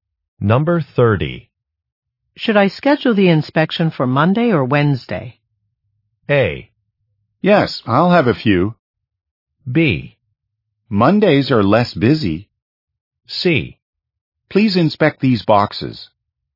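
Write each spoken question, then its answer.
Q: Should I schedule the inspection for Monday or Wednesday?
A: B: Mondays are less busy.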